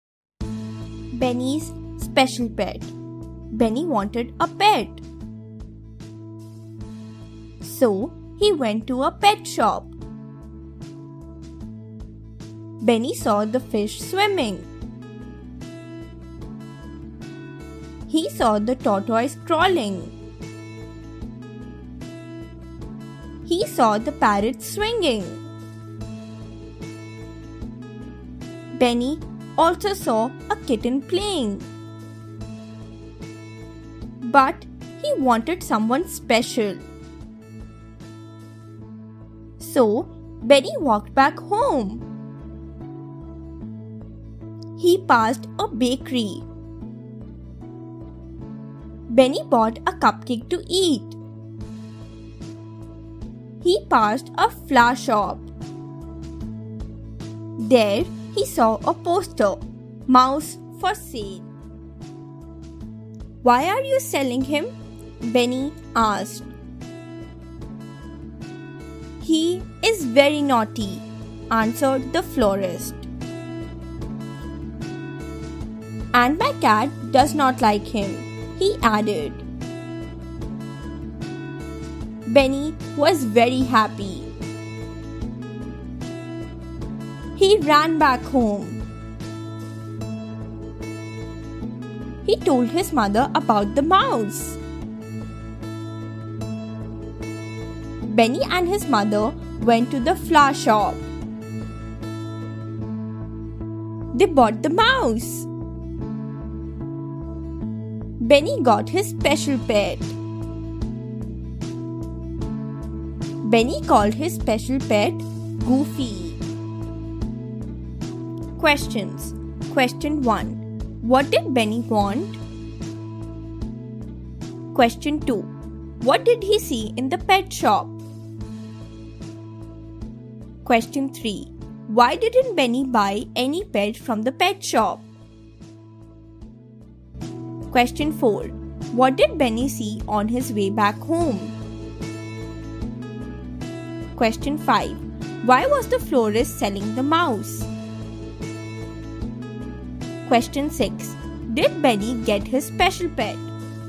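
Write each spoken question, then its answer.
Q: What did Benny want?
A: A special pet

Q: What did he see in the pet shop?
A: Fish, a tortoise, a parrot and a kitten

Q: Why didn't Benny buy any pet from the pet shop?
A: He wanted someone special

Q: What did Benny see on his way back home?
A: A bakery and a flower shop with a poster, "Mouse for sale"

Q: Why was the florist selling the mouse?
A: He was very naughty and the florist's cat did not like him

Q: Did Benny get his special pet?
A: Yes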